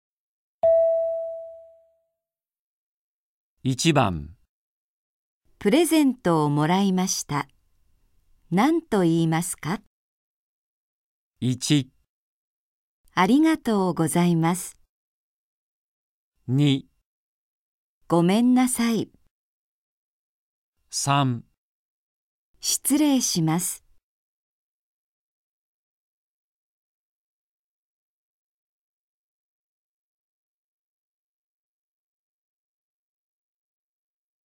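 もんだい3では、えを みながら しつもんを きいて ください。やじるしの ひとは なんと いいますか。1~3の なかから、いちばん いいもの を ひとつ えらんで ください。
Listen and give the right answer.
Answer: ありがとうございます。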